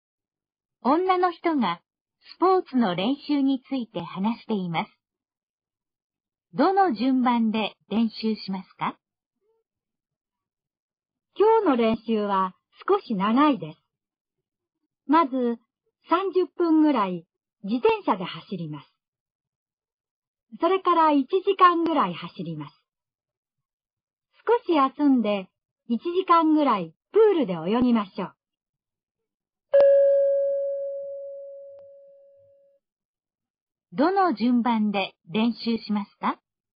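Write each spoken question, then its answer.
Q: どの順番で練習しますか?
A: 自転車、走る、泳ぐの順番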